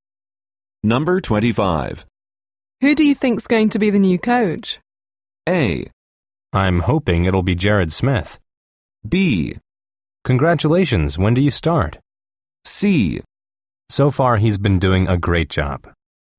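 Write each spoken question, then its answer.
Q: Who do you think's going to be the new coach?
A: A: I'm hoping it'll be Jared Smith.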